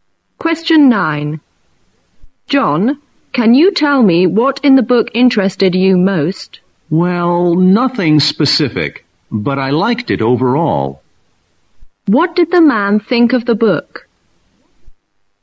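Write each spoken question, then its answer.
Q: What did the man think of the book?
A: He liked it overall, though nothing in particular stood out.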